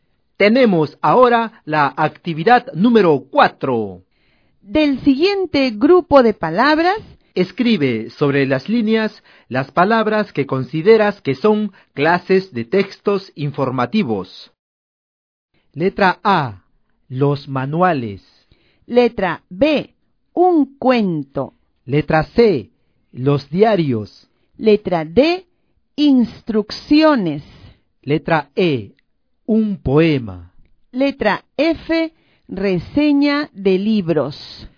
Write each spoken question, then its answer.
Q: escribe sobre las líneas las palabras que consideras que son clases de textos informativos.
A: Tenemos como clases de textos informativos, por supuesto, los manuales y las instrucciones. También se consideran textos informativos los diarios y la reseña de libros.